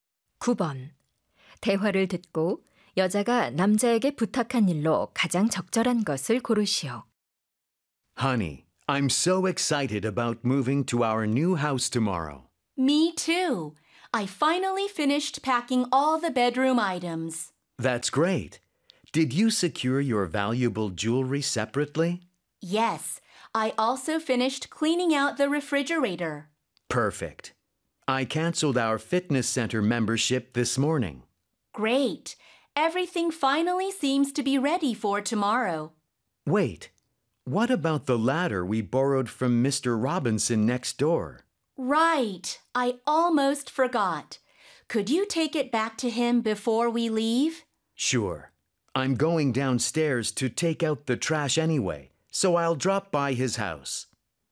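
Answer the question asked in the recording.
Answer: 이웃에게 빌린 사다리 돌려주기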